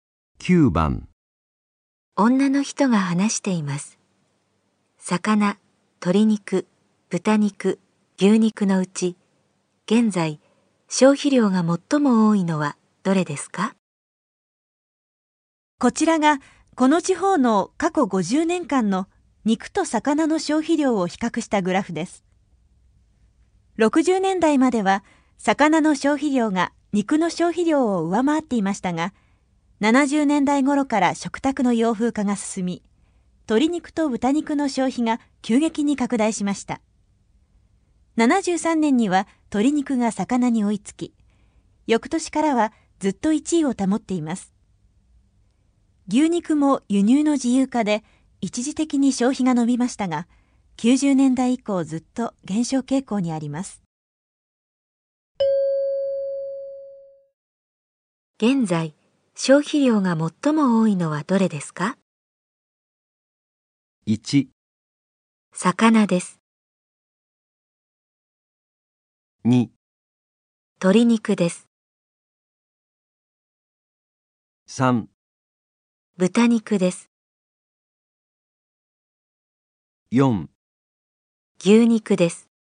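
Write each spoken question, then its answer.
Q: 現在、消費量が最も多いのはどれですか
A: 2: 鶏肉です。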